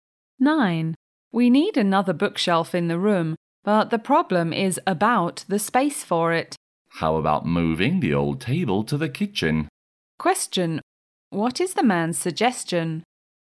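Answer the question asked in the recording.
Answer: Moving the old table to the kitchen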